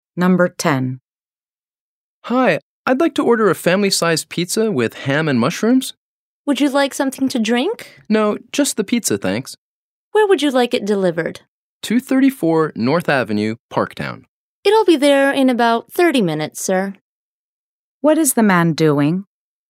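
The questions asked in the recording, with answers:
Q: What is the man doing?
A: Ordering a pizza for delivery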